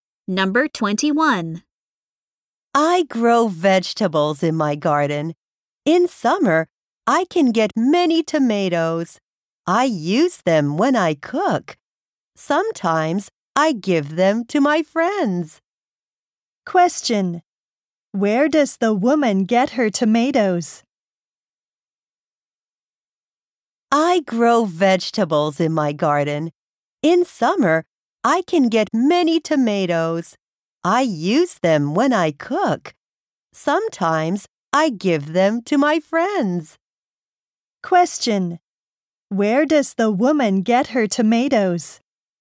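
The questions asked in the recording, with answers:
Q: Where does the woman get her tomatoes?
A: From her garden.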